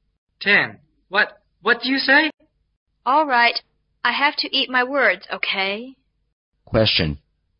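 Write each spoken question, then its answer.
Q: What does eat my words mean?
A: To admit that what I said was wrong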